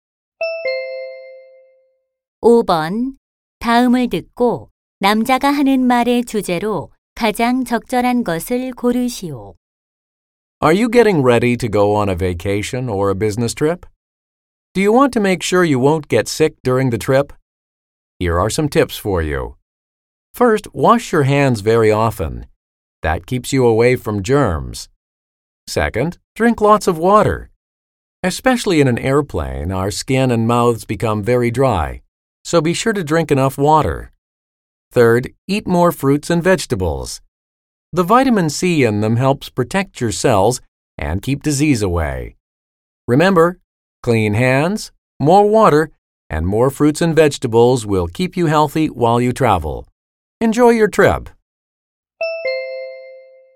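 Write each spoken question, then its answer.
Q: 다음을 듣고 남자가 하는 말의 주제로 가장 적절한 것을 고르시오.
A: 여행 중 건강을 지키는 방법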